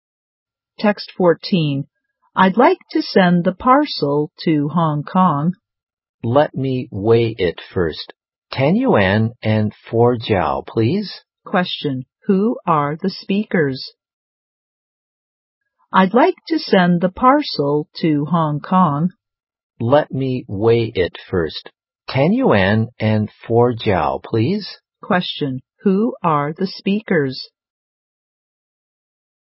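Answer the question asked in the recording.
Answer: A customer and a post office clerk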